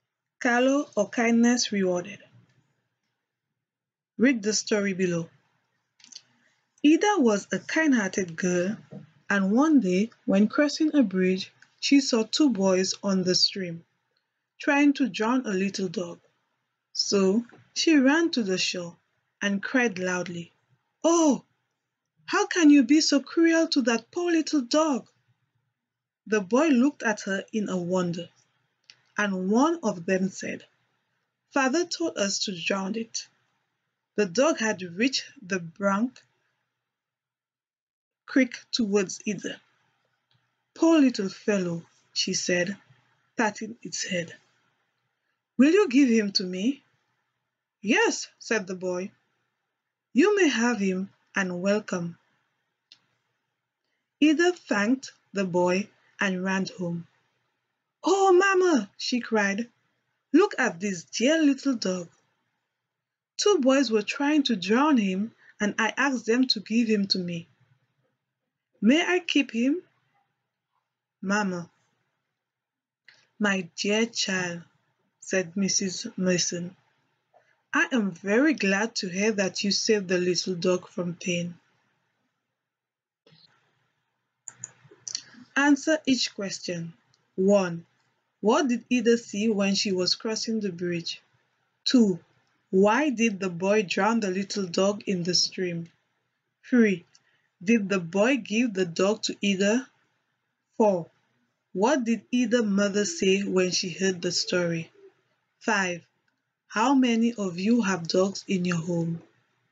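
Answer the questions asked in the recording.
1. Two boys in the stream trying to drown a little dog
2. Their father told them to drown it
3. Yes
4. She was very glad Ida saved the little dog from pain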